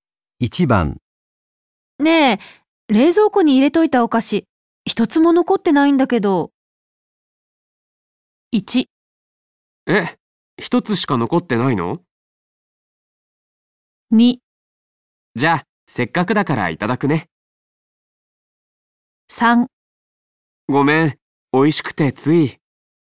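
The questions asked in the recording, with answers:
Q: ねえ冷蔵庫に入れといたお菓子、一つも残ってないんだけど。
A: 3: ごめん、美味しくてつい。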